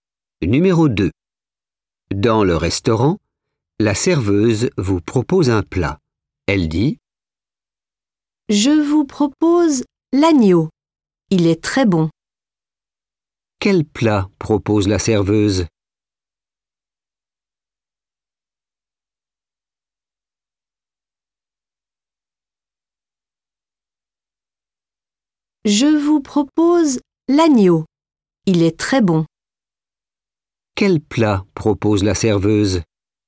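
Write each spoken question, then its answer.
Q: Quel plat propose la serveuse?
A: l'agneau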